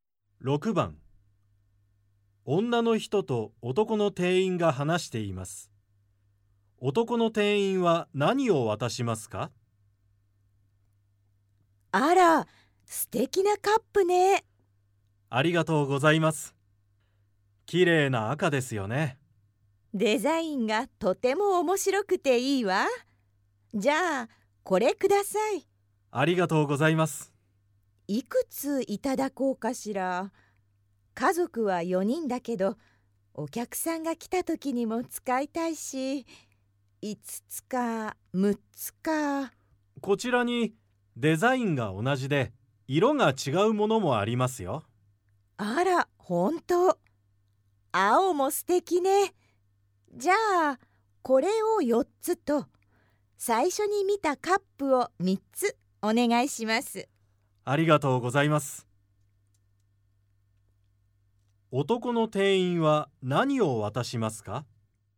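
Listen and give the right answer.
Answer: 青いカップ4つと赤いカップ3つ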